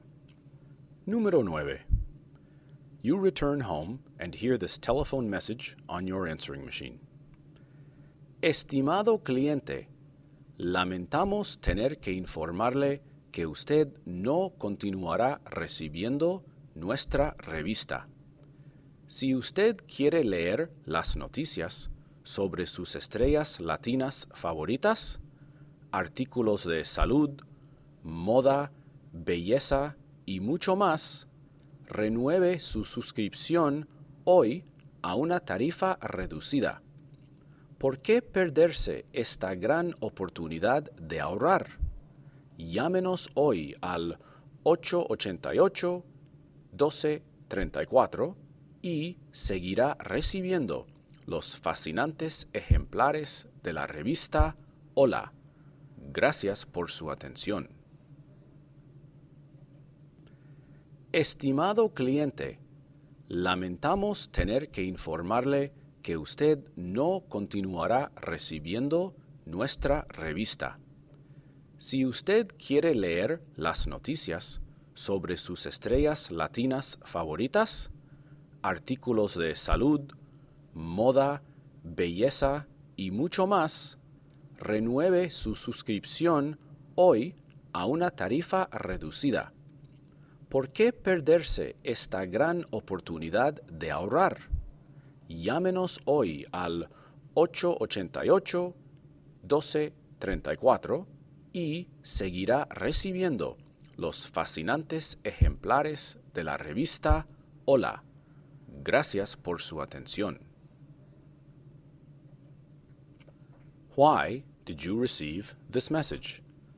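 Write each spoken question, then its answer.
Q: Why did you receive this message?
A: Your magazine subscription has expired and needs renewing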